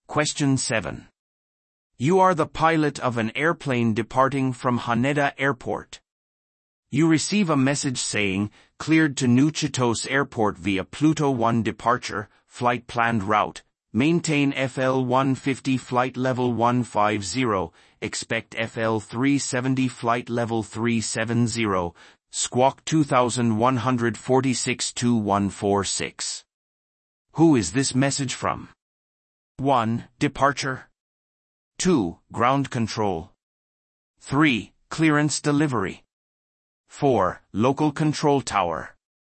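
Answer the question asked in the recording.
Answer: 3: Clearance delivery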